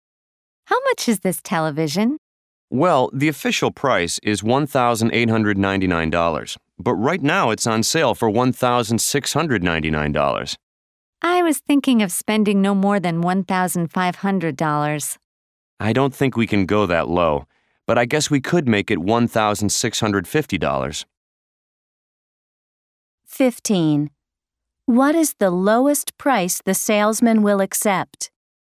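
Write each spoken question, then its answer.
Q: What is the lowest price the salesman will accept?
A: $1,650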